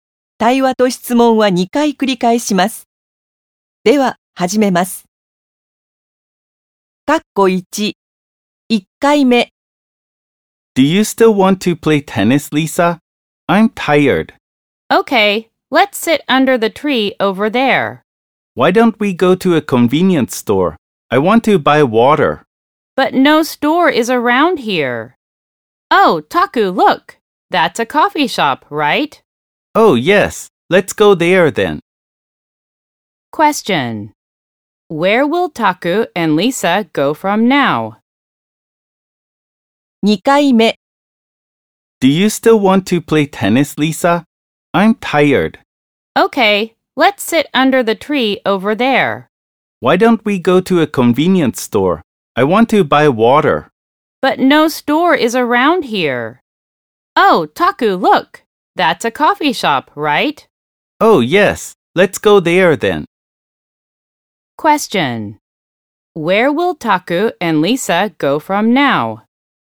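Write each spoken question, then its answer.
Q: Where will Taku and Lisa go from now?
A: To a coffee shop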